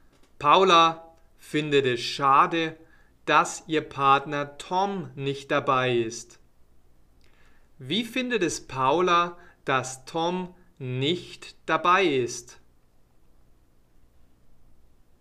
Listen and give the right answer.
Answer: Sie findet es schade.